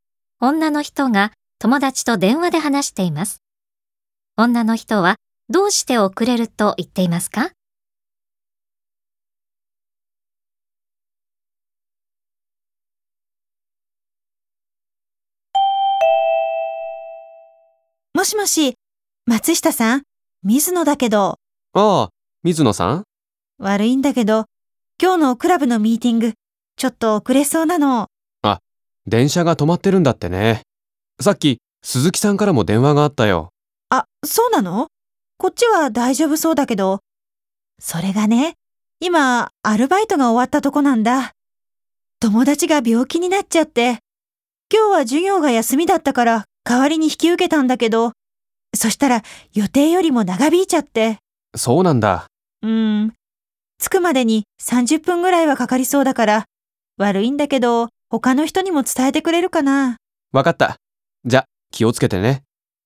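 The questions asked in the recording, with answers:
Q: 女の人はどうして遅れると言っていますか?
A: アルバイトが予定より長引いたから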